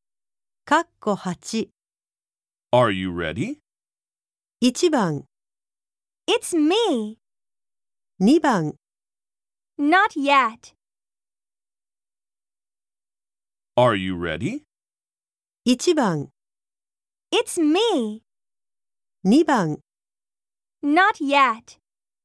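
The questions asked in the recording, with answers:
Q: Are you ready?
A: 2: Not yet.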